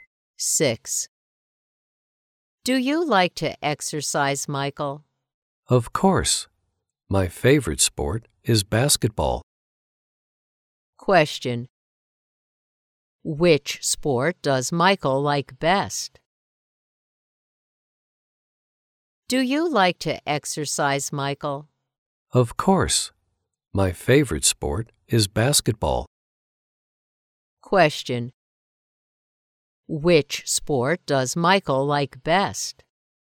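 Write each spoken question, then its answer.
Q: Which sport does Michael like best?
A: Basketball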